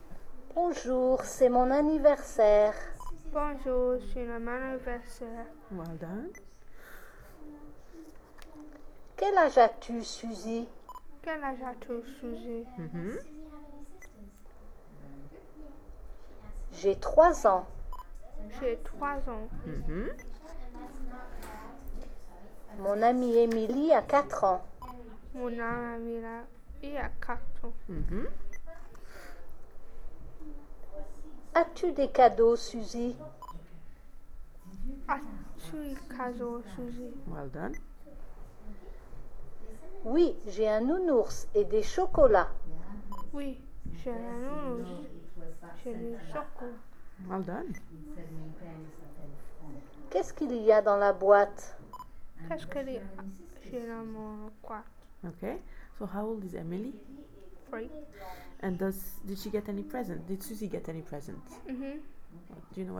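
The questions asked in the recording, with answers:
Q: Did Susie get any present?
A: Yes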